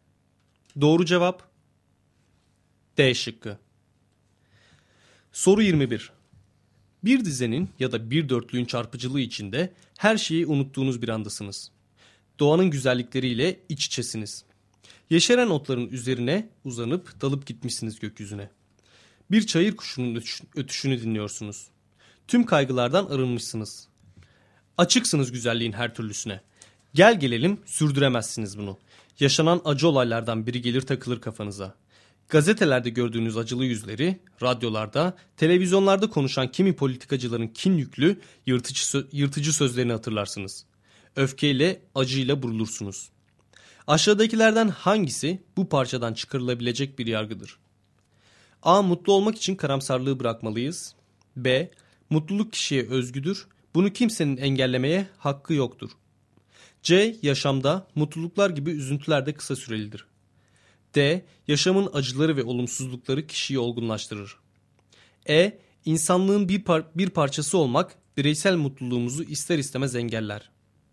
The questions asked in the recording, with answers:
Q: Aşağıdakilerden hangisi bu parçadan çıkarılabilecek bir yargıdır?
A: Doğru cevap E şıkkı.